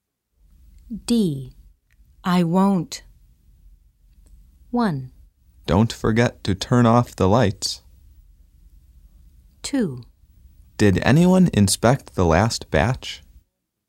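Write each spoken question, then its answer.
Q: I won't.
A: 1: Don't forget to turn off the lights.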